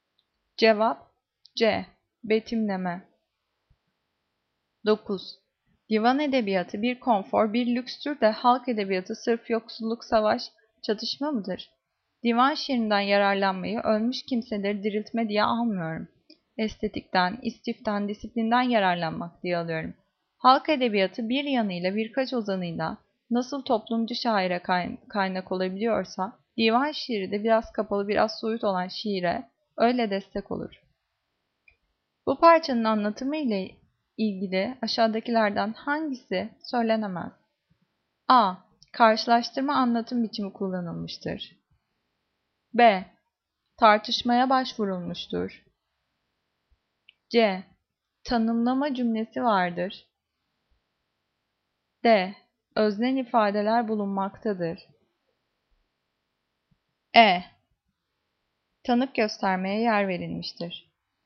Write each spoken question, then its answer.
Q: Bu parçanın anlatımı ile ilgili aşağıdakilerden hangisi söylenemez?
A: Cevap E. Tanık göstermeye yer verilmiştir.